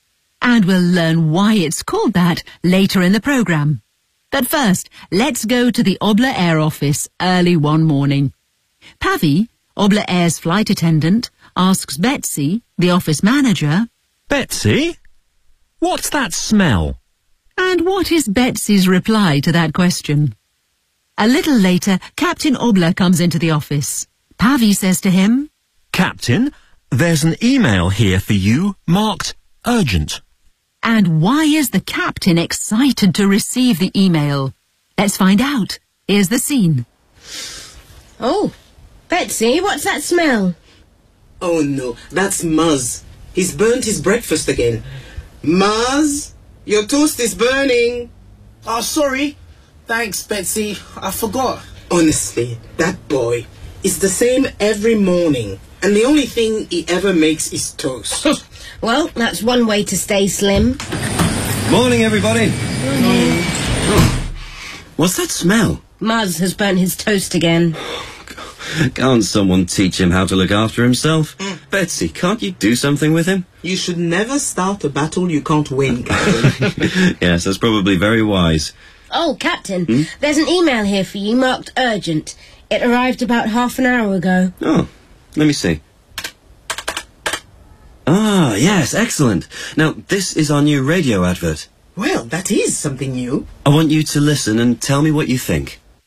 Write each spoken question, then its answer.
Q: And what is Betsy's reply to that question?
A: That's Muzz. He's burnt his breakfast again.